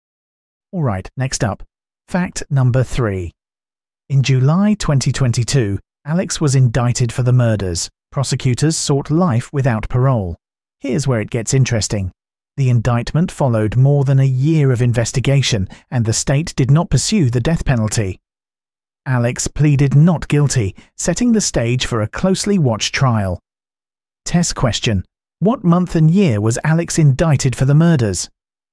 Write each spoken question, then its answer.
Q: What month and year was Alex indicted for the murders?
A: July 2022.